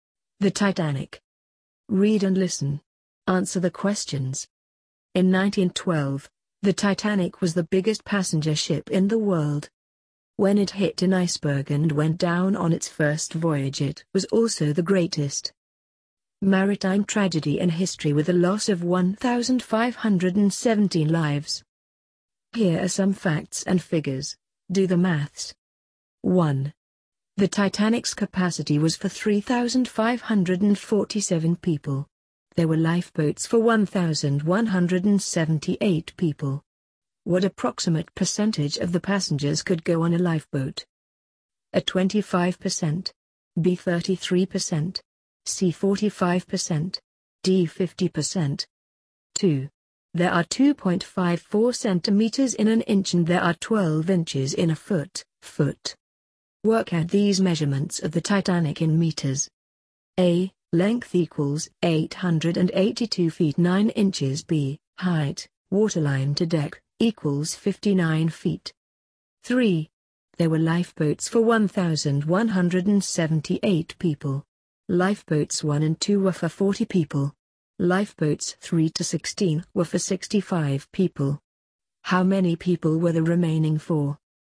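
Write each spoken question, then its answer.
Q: What approximate percentage of the passengers could go on a lifeboat?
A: B: 33%

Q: Work out these measurements of the Titanic in meters. A. Length equals 882 feet 9 inches.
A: about 269 m

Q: B. Height, waterline to deck, equals 59 feet.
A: about 18 m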